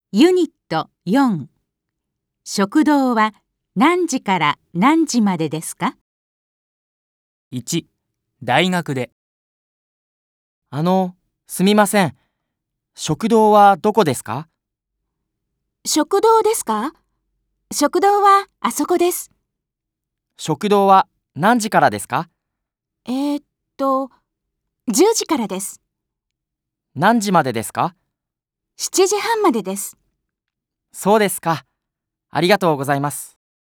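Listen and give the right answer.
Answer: 10時から7時半までです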